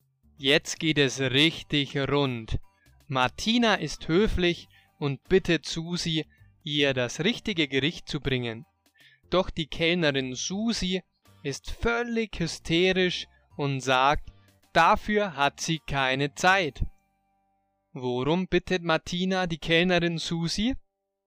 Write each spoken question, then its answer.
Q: Worum bittet Martina die Kellnerin Susi?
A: Sie bittet sie darum, ihr das richtige Gericht zu bringen.